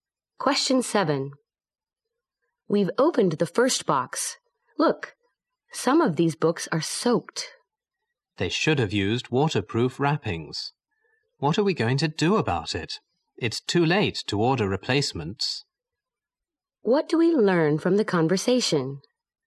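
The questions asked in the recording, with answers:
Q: What do we learn from the conversation?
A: Some books were soaked, and it's too late to order replacements.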